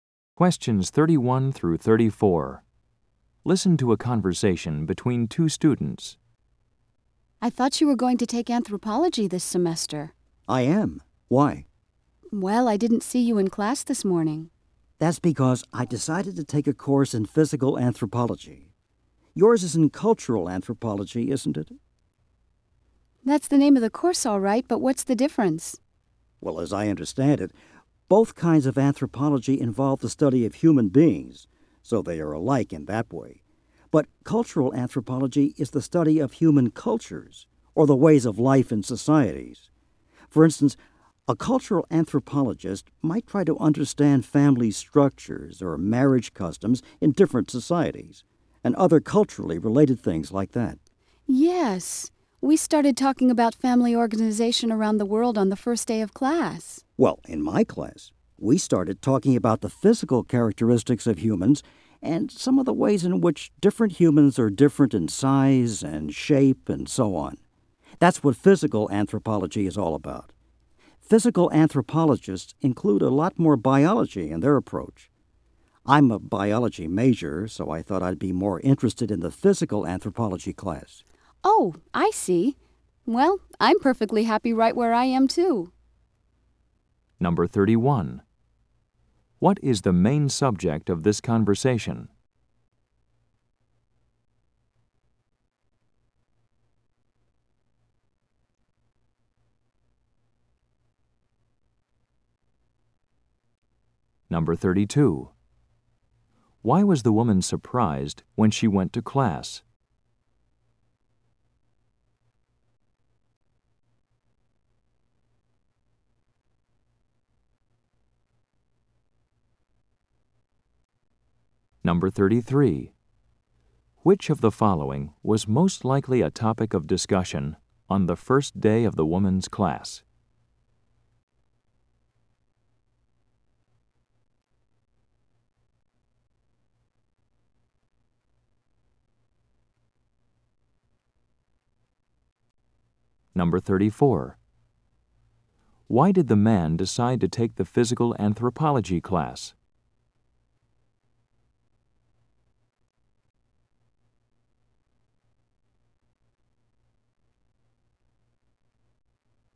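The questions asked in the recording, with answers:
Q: What is the main subject of this conversation?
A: The difference between cultural and physical anthropology

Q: Why was the woman surprised when she went to class?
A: The man wasn't in her anthropology class

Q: Why did the man decide to take the physical anthropology class?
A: He is a biology major and it includes more biology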